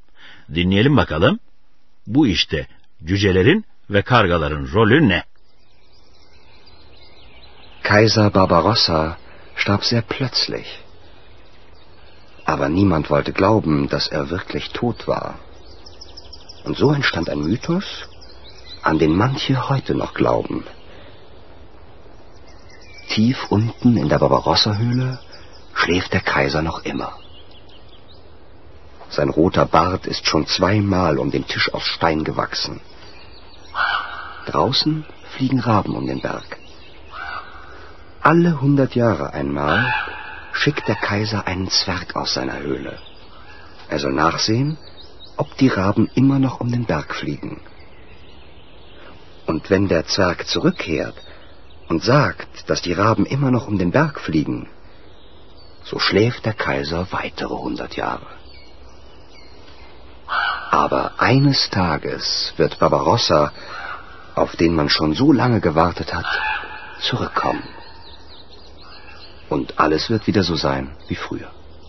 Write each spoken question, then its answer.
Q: Bu işte cücelerin ve kargaların rolü ne?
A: Cüce dışarıya çıkıp kargaların hala dağın çevresinde uçup uçmadığına bakıyormuş.